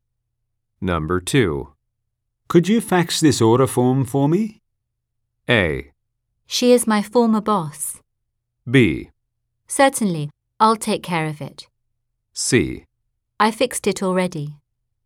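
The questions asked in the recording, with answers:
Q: Could you fax this order form for me?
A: B: Certainly, I'll take care of it.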